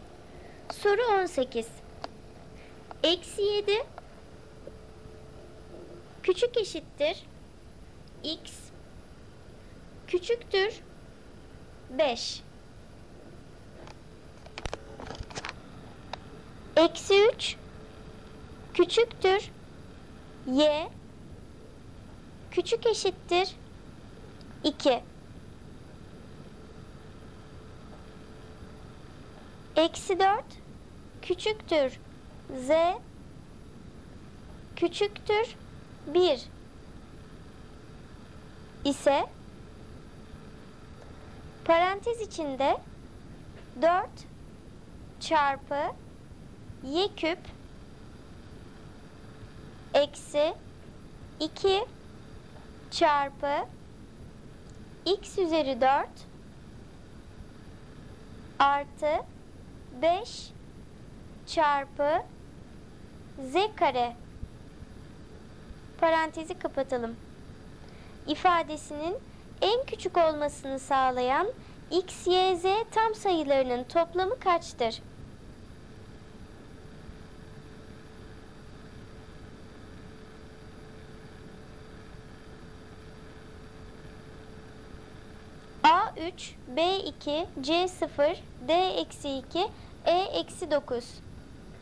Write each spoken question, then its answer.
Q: İfadesinin en küçük olmasını sağlayan x, y, z tam sayılarının toplamı kaçtır?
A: Doğru cevap E eksi 9.